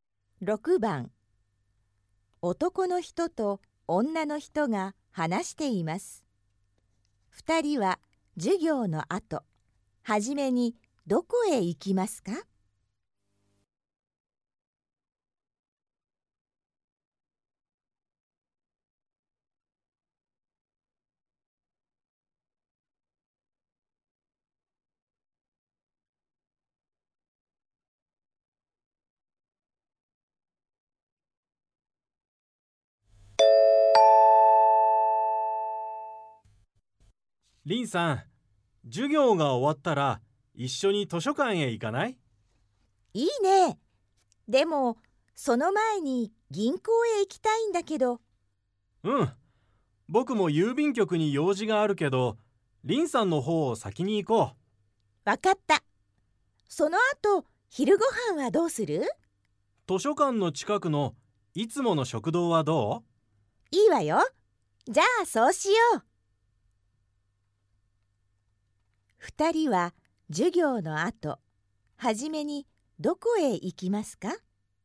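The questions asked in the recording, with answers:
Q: 二人は授業の後、はじめにどこへ行きますか?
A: 銀行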